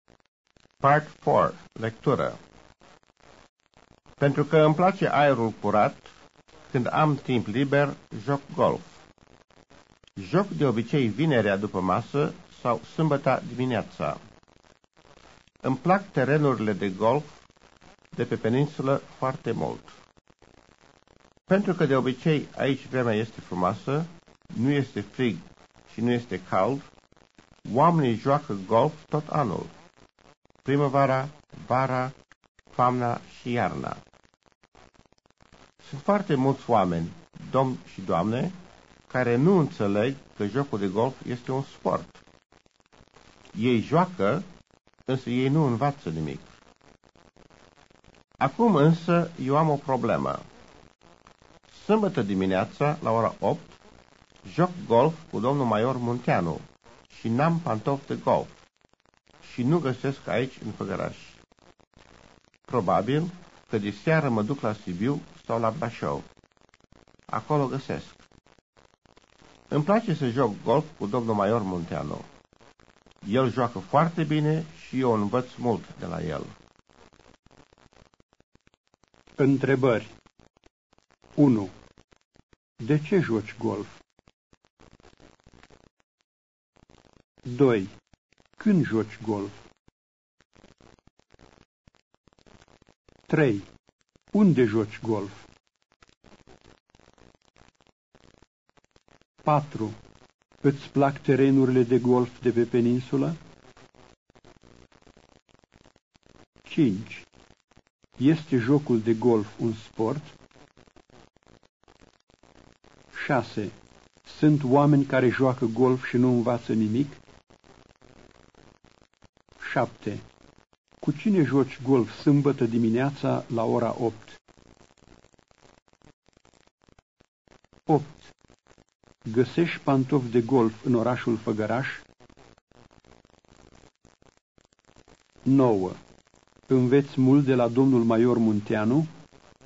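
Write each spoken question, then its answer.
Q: De ce joci golf?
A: Pentru că îmi place aerul curat.

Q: Când joci golf?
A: Vinerea după masă sau sâmbăta dimineața.

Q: Îți plac terenurile de golf de pe peninsulă?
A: Da, foarte mult.

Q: Este jocul de golf un sport?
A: Da.

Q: Sunt oameni care joacă golf și nu învață nimic?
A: Da.

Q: Cu cine joci golf sâmbătă dimineața la ora 8?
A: Cu domnul Maior Munteanu.

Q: Găsești pantofi de golf în orașul Făgăraș?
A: Nu.

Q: Înveți mult de la domnul Maior Munteanu?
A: Da.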